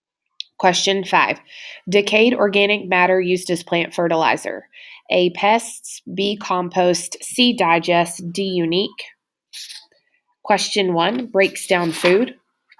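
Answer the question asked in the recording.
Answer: B: compost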